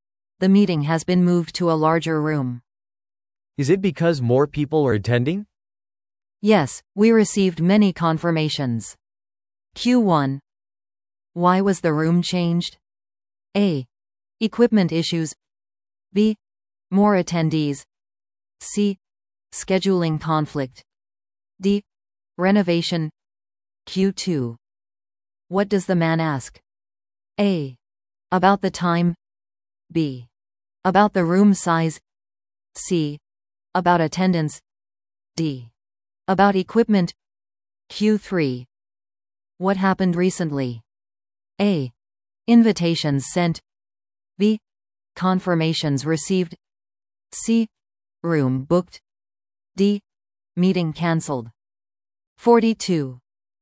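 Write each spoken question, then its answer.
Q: Why was the room changed?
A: B: More attendees.

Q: What does the man ask?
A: C: About attendance.

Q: What happened recently?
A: B: Confirmations received.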